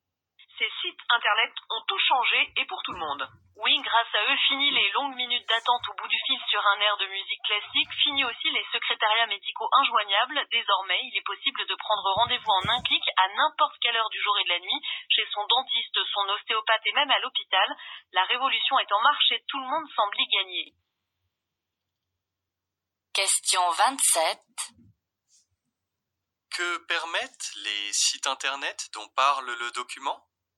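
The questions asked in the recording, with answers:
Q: Que permettent les sites internet dont parle le document ?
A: Prendre rendez-vous médical en ligne en un clic, à toute heure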